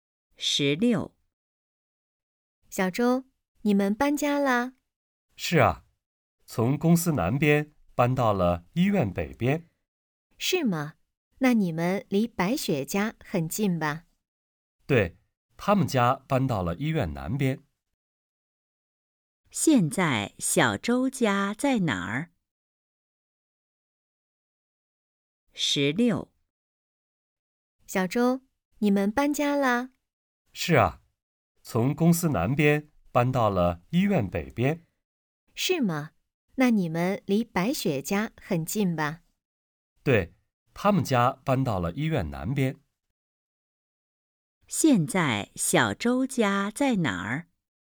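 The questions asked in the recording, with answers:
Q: 现在小周家在哪儿?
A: 医院北边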